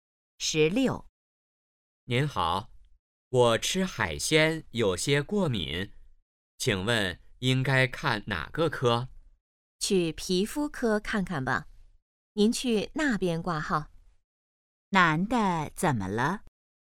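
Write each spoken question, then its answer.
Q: 男的怎么了?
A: 吃海鲜过敏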